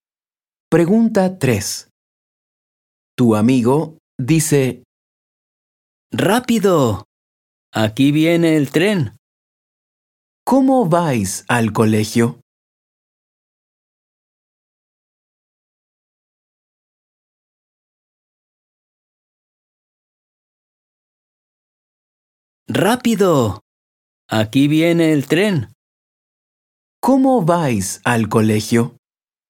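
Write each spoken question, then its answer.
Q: ¿Cómo vais al colegio?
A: En tren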